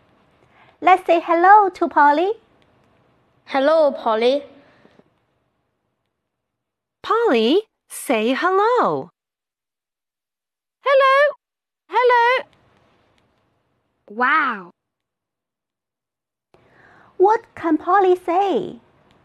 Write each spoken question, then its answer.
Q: What can Polly say?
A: Polly can say hello, hello.